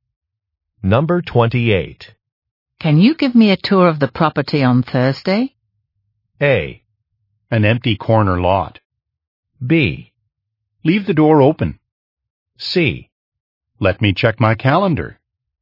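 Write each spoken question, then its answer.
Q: Can you give me a tour of the property on Thursday?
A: C: Let me check my calendar.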